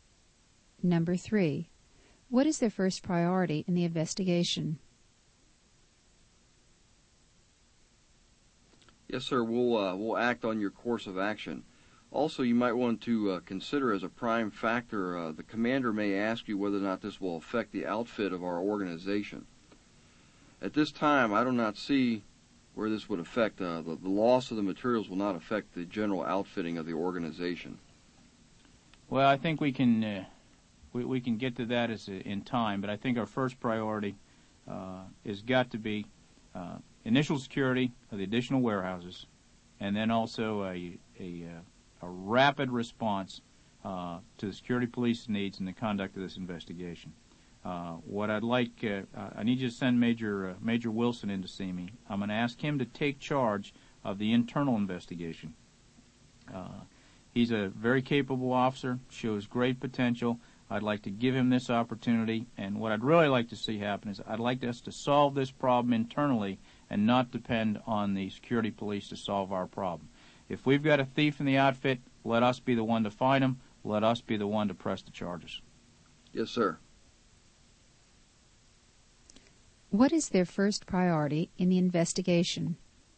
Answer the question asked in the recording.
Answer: Their first priority is the initial security of the additional warehouses.